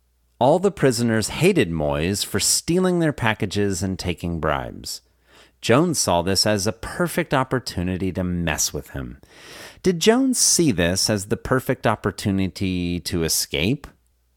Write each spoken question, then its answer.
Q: Did Jones see this as the perfect opportunity to escape?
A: No, he didn't see this as the perfect opportunity to escape.